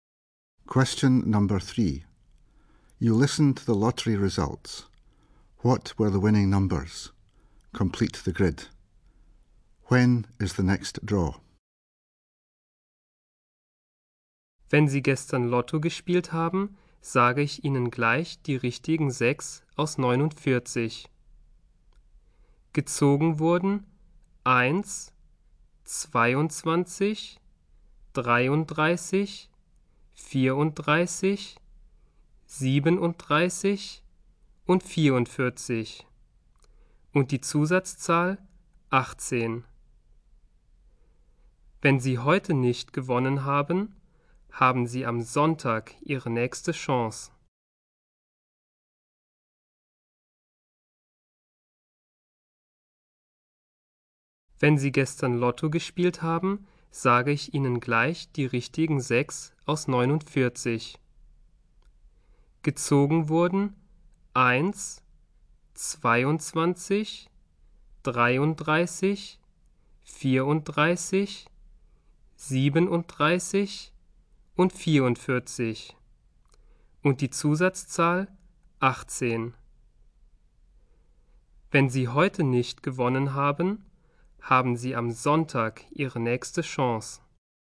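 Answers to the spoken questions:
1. 1, 22, 33, 34, 37, 44, bonus number 18
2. Sunday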